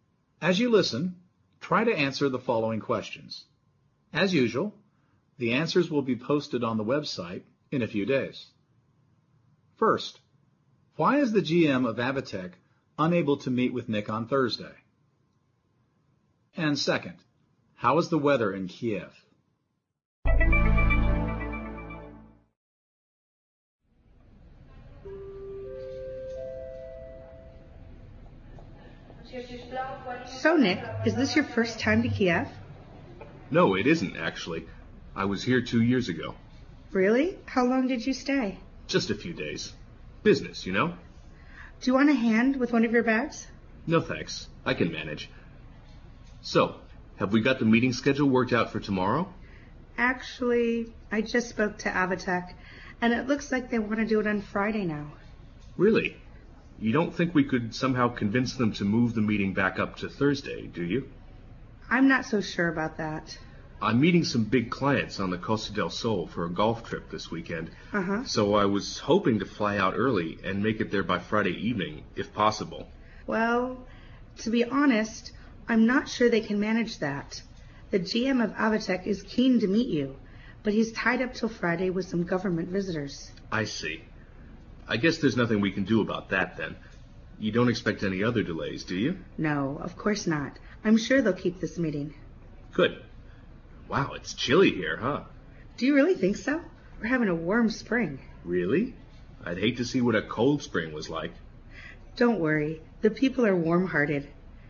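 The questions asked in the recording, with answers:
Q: First, why is the GM of Avitec unable to meet with Nick on Thursday?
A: He's tied up till Friday with some government visitors.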